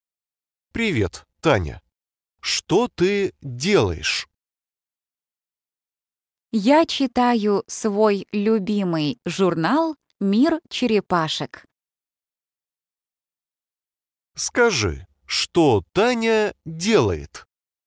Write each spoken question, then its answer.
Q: Скажи, что Таня делает?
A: Она читает журнал.